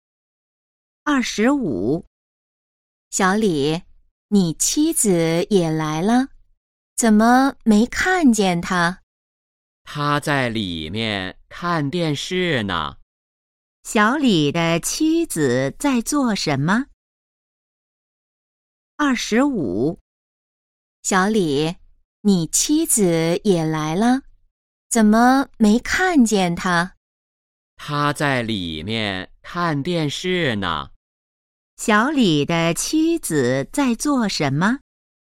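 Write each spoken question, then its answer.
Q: 小李的妻子在做什么?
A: 在里面看电视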